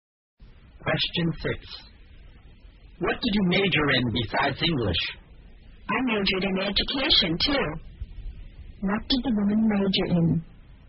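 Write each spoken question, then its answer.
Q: What did the woman major in?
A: English and education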